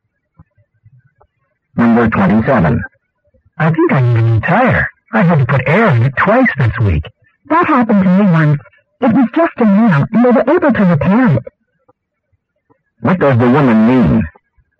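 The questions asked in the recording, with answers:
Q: What does the woman mean?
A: The tire may only need repairing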